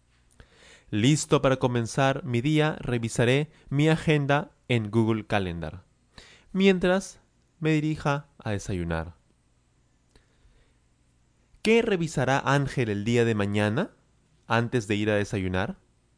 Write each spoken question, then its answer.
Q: ¿Qué revisará Ángel el día de mañana antes de ir a desayunar?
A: Él revisará su agenda, su agenda en Google Calendar, mientras se dirija a desayunar.